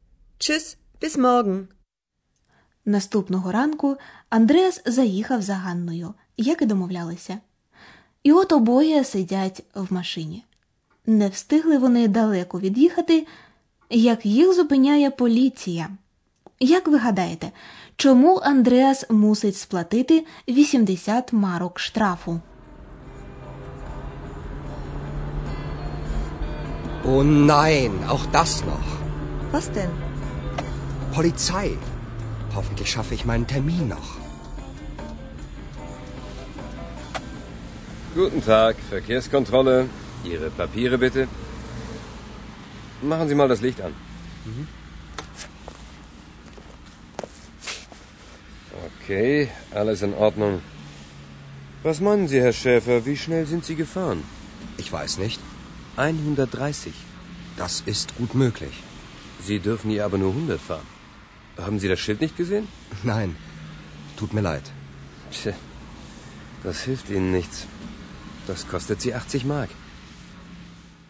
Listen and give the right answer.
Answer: Андреас має сплатити 80 марок штрафу, тому що він перевищив швидкість.